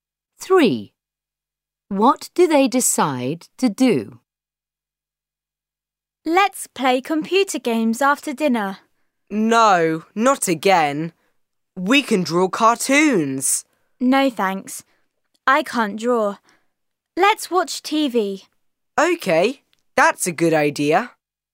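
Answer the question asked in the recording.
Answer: watch TV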